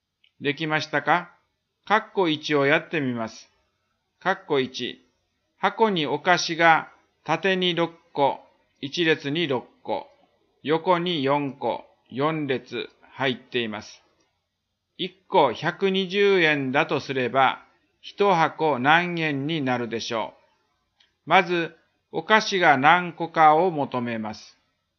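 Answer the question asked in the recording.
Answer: 2880円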